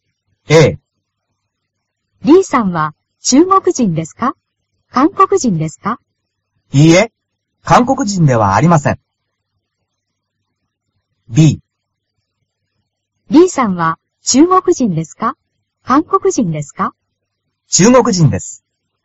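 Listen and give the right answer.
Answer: B: 中国人です。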